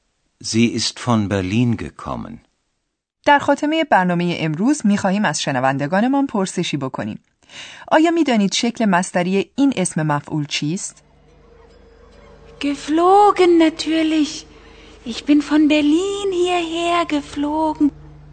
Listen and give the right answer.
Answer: شکل مصدری آن عبارت است از fliegen یعنی پرواز کردن